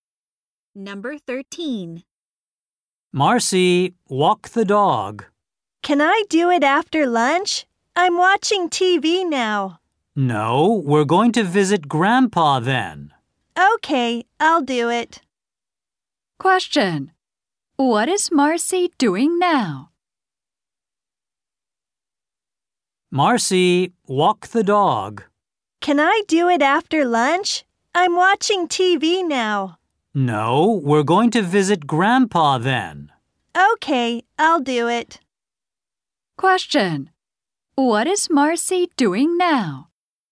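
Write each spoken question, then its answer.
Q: What is Marcy doing now?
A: Watching TV.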